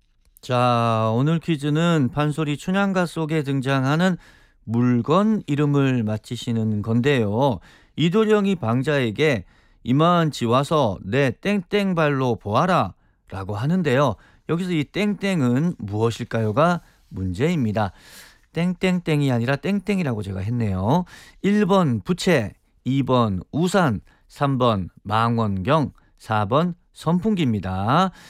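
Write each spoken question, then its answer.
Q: 여기서 이 땡땡은 무엇일까요가 문제입니다.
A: 1: 부채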